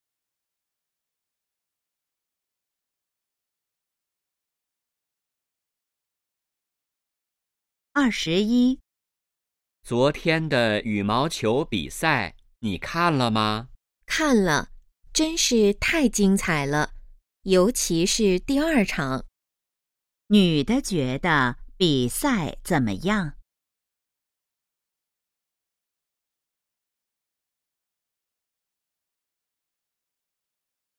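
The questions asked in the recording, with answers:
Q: 女的觉得比赛怎么样?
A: 非常精彩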